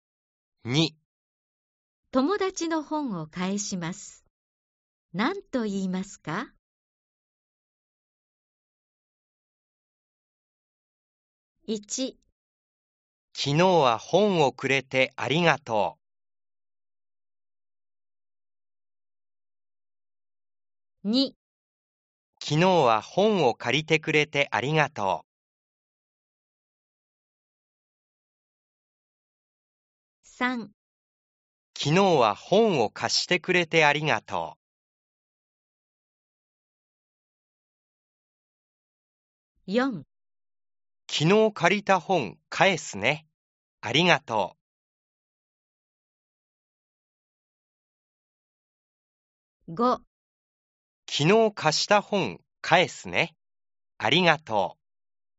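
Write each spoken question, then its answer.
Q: 友達の本を返します。何と言いますか?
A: ○: 3 昨日は本を貸してくれてありがとう。/ 4 昨日借りた本返すね。ありがとう。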